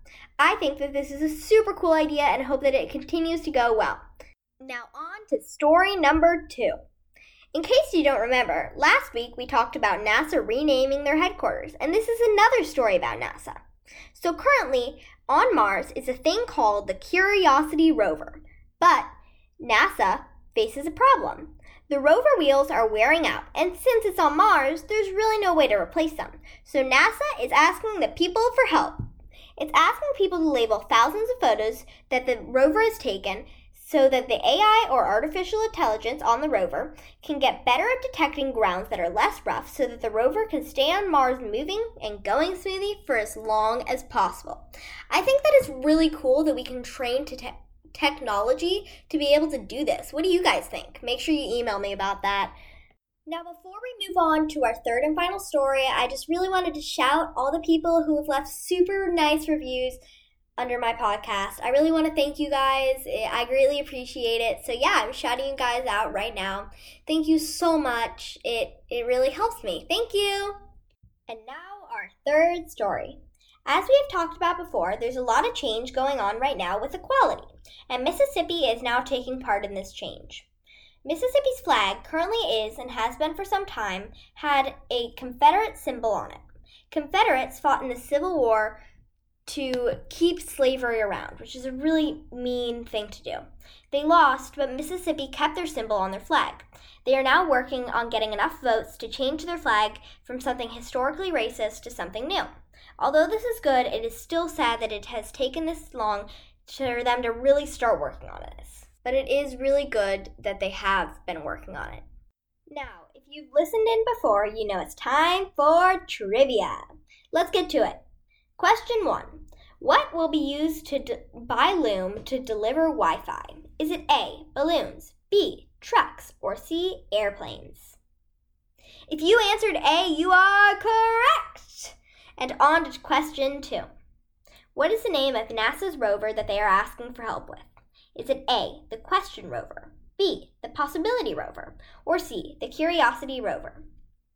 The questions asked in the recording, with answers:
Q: What is the name of NASA's rover that they are asking for help with? Is it A, the Question Rover, B, the Possibility Rover, or C, the Curiosity Rover?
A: If you answered C, you are correct!